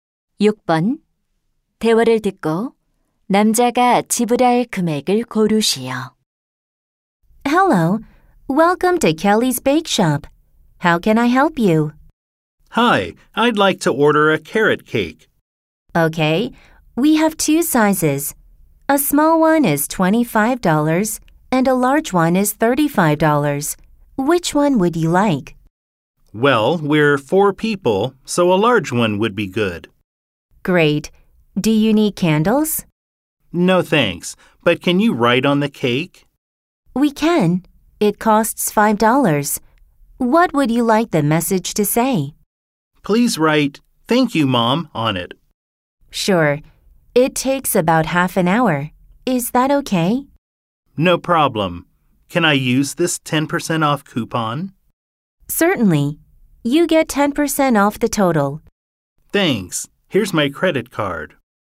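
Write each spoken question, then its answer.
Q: 대화를 듣고 남자가 지불할 금액을 고르시오.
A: $36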